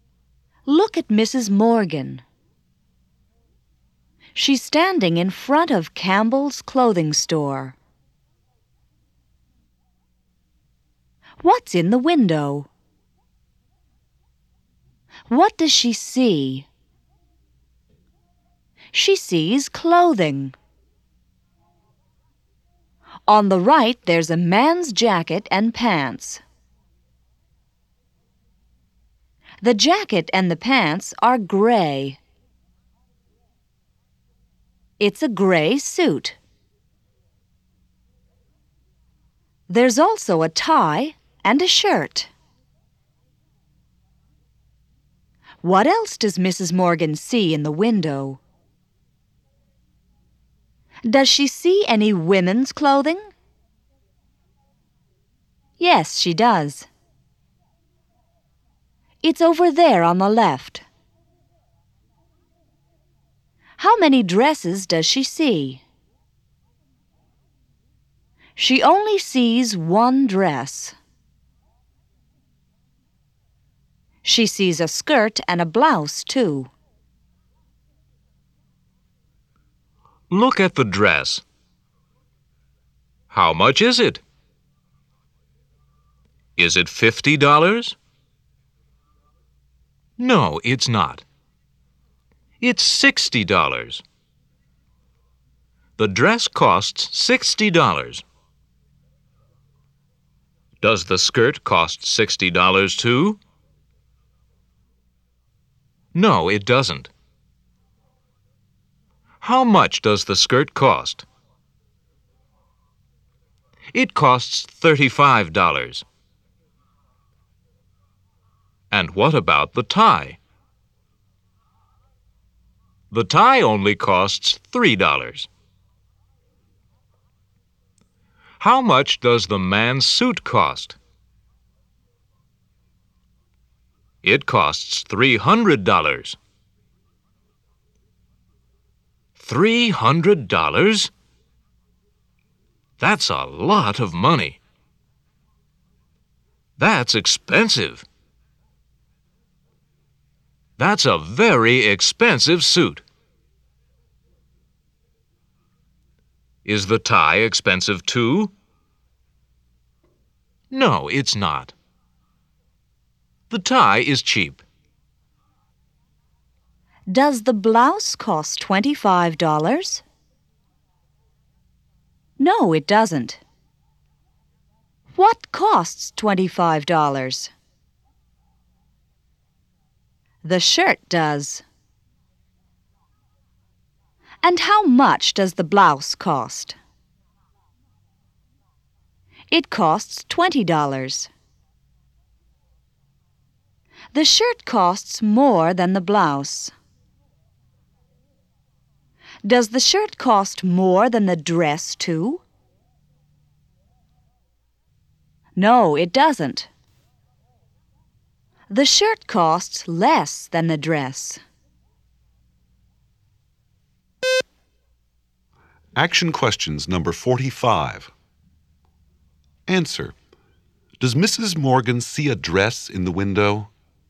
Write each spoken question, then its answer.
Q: Does Mrs. Morgan see a dress in the window?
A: Yes, she does.